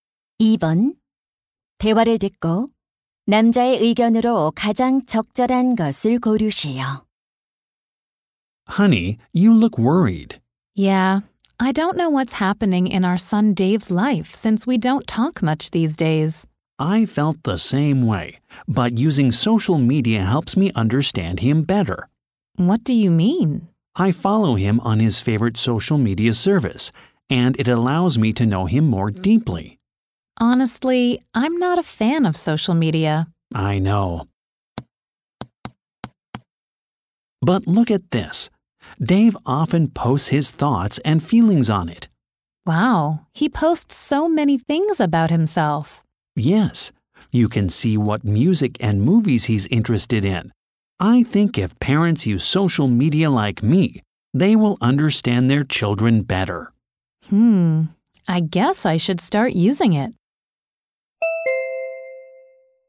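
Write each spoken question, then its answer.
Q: 대화를 듣고 남자의 의견으로 가장 적절한 것을 고르시오.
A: 부모가 소셜 미디어를 이용하면 자녀를 더 잘 이해할 수 있다.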